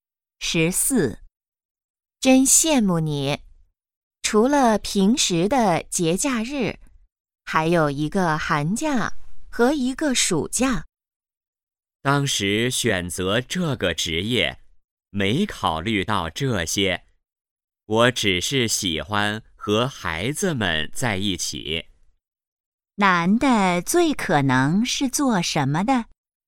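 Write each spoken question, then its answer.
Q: 男的最可能是做什么的?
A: 老师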